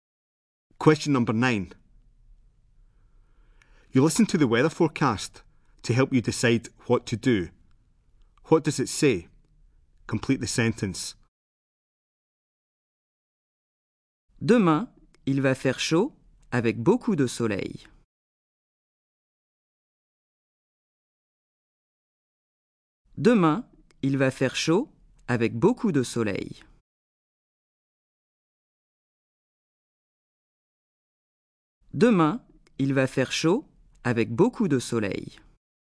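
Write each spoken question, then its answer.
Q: What does it say?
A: Tomorrow it will be hot with lots of sun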